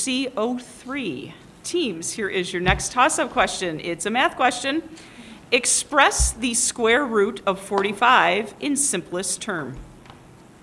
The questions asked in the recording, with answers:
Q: Express the square root of 45 in simplest term.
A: Good for 5 points.